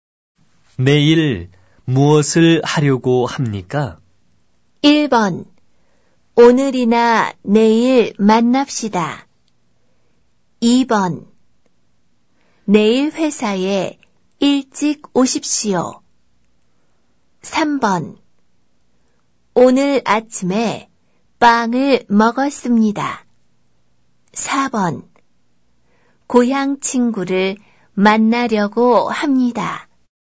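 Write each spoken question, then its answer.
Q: 내일 무엇을 하려고 합니까?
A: 4: 고향 친구를 만나려고 합니다.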